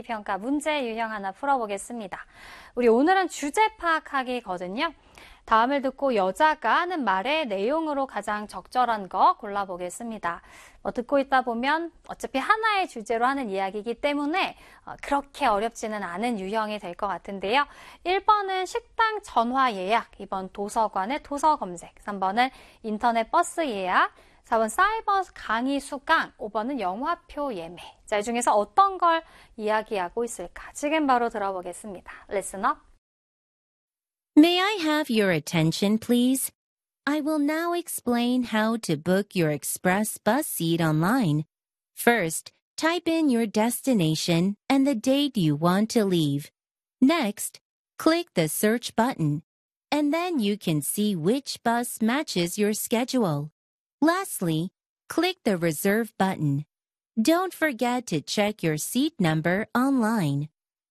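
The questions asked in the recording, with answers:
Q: 다음을 듣고 여자가 하는 말의 내용으로 가장 적절한 거 골라보겠습니다.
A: 3: 인터넷 버스 예약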